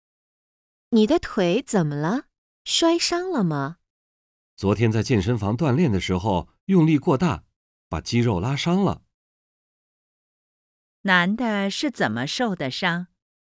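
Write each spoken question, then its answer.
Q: 男的是怎么受的伤?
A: 在健身房锻炼时用力过大,把肌肉拉伤了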